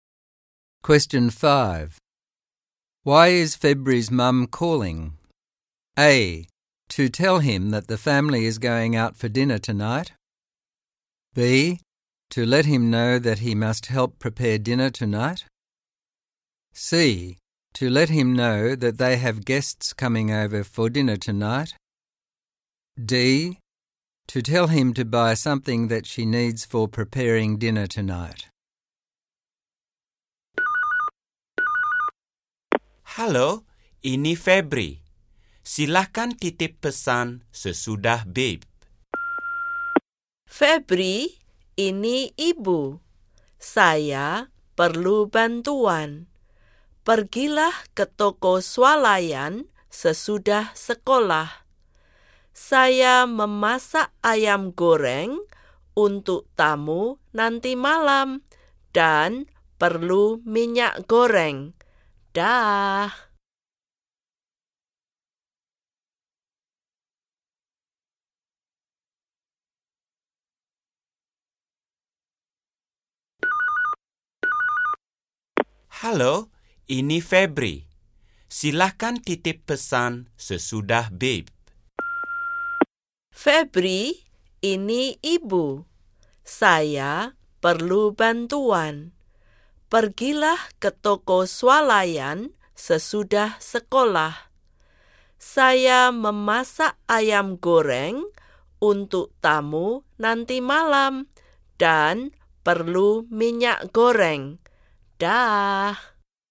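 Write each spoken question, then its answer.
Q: Why is February's mum calling?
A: D: To tell him to buy something that she needs for preparing dinner tonight.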